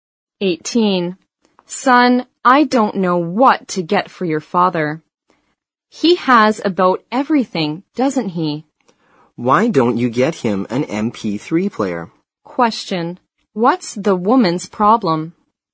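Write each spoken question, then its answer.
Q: What's the woman's problem?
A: She doesn't know what to get for her husband (the son's father).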